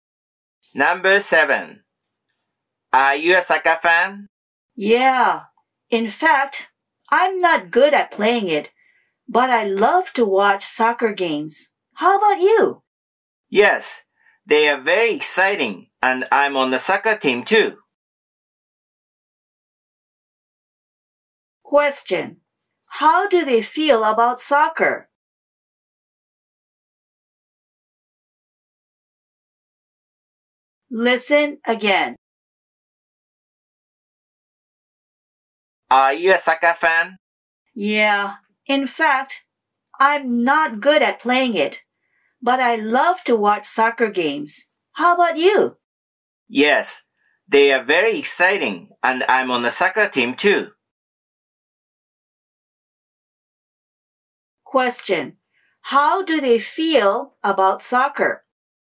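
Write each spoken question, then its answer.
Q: How do they feel about soccer?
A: They both like soccer.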